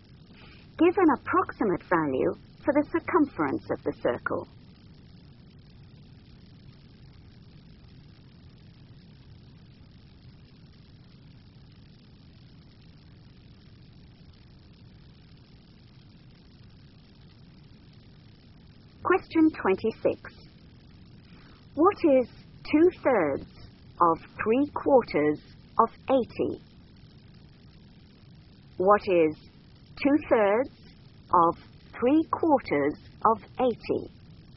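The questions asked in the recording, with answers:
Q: What is 2/3 of 3/4 of 80?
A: 40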